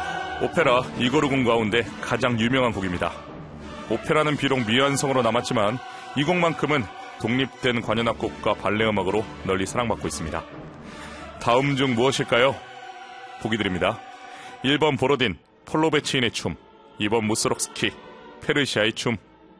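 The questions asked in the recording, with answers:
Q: 다음 중 무엇일까요?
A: 1번: 보로딘, 폴로베치인의 춤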